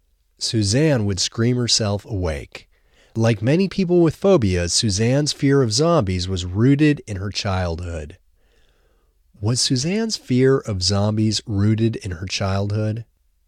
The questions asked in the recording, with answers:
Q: Was Suzanne's fear of zombies rooted in her childhood?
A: Yes, Suzanne's fear of zombies was rooted in her childhood.